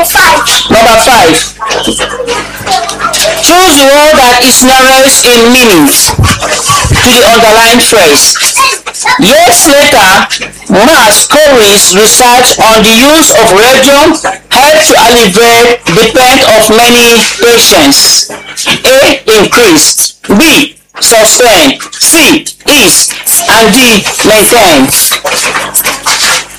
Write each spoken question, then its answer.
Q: Choose the word that is nearest in meanings to the underlying phrase.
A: the answer is C.